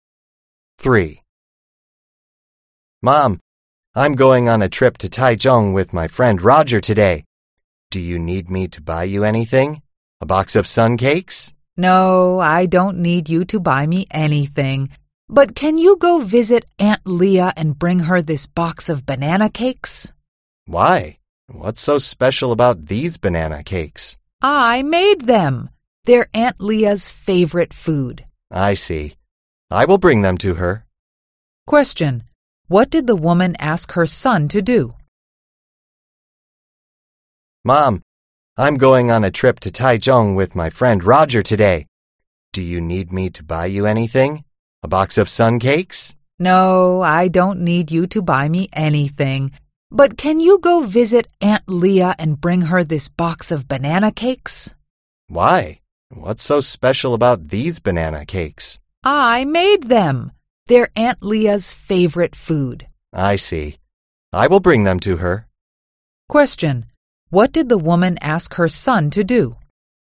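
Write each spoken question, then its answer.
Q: What did the woman ask her son to do?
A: Visit Aunt Leah and bring her a box of banana cakes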